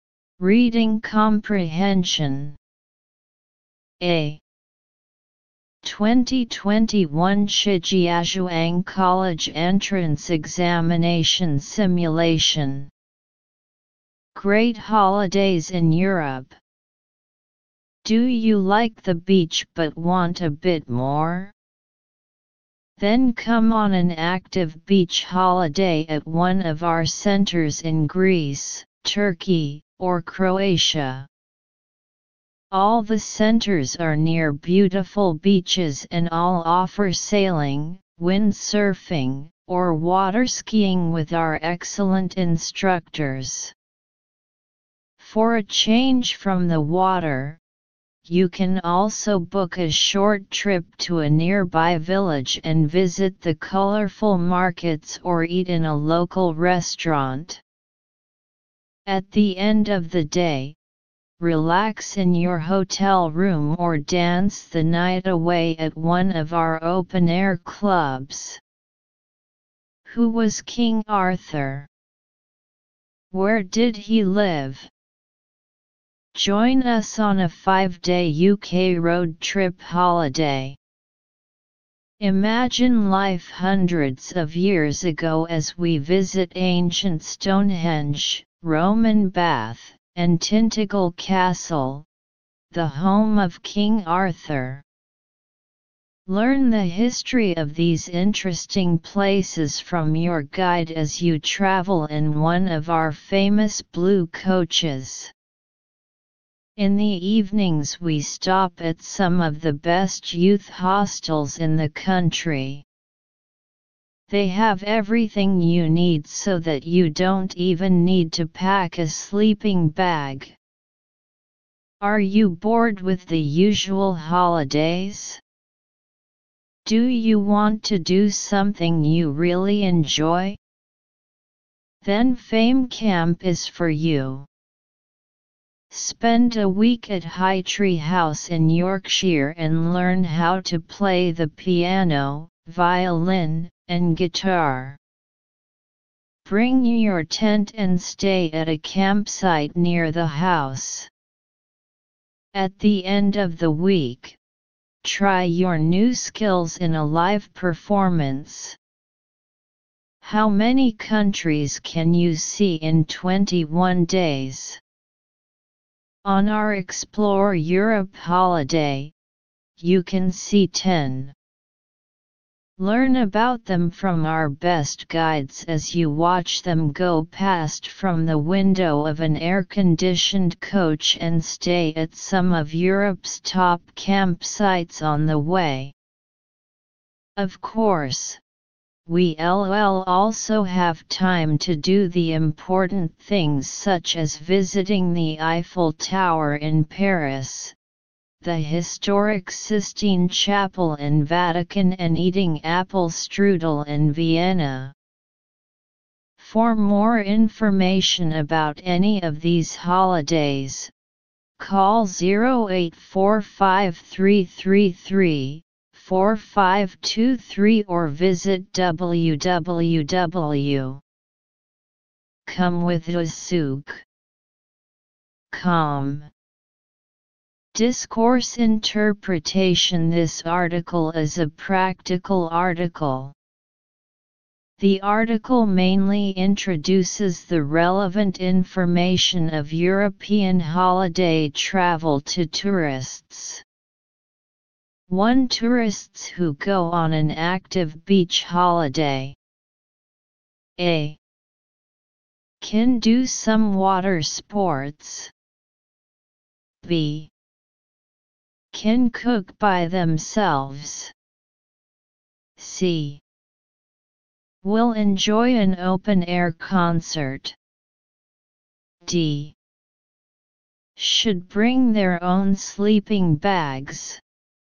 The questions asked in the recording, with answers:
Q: Tourists who go on an active beach holiday.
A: So choose A. Answer A.